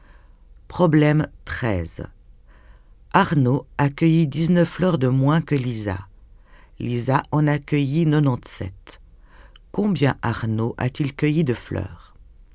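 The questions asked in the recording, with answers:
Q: Combien Arnaud a-t-il cueilli de fleurs?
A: 78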